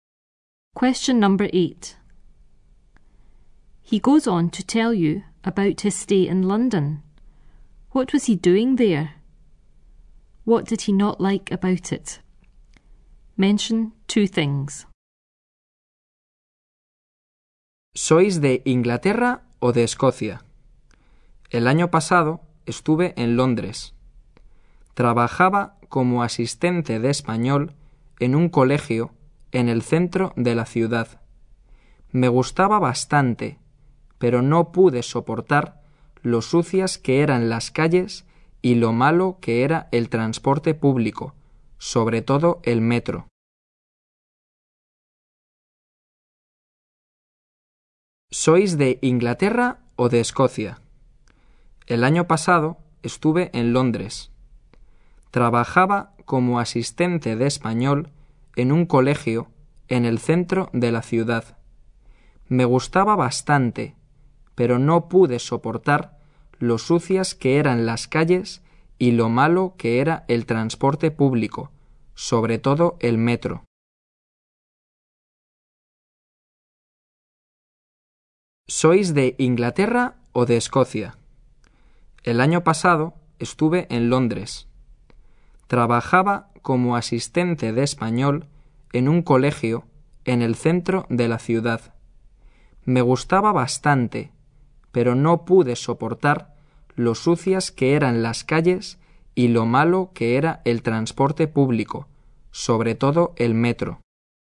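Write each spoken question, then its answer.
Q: What was he doing there? What did he not like about it?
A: Spanish assistant at a school in the city centre; dirty streets and bad public transport, especially the underground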